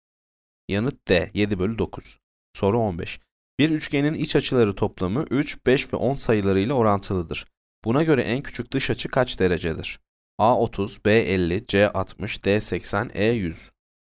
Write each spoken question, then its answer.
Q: Buna göre en küçük dış açı kaç derecedir?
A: Yanıt D 80.